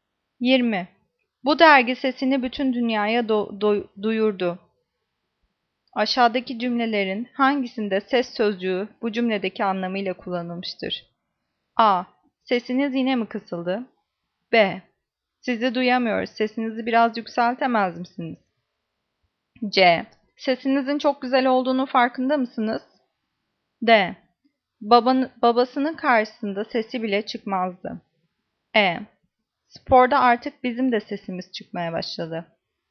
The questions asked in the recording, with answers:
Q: Aşağıdaki cümlelerin hangisinde ses sözcüğü bu cümledeki anlamıyla kullanılmıştır?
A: Cevap E. Sporda artık bizim sesimiz de çıkmaya başladı.